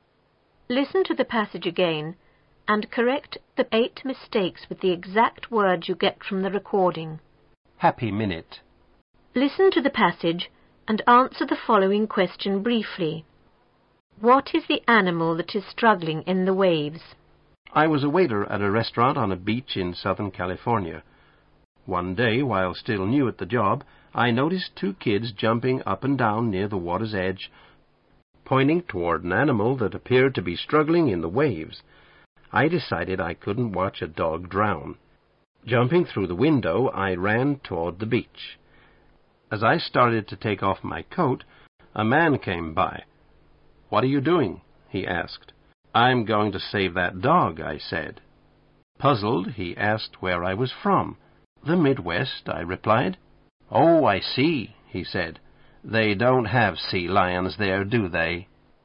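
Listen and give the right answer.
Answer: A sea lion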